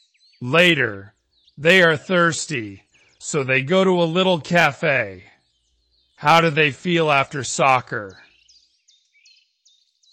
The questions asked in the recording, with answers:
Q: How do they feel after soccer?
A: Thirsty. They feel thirsty.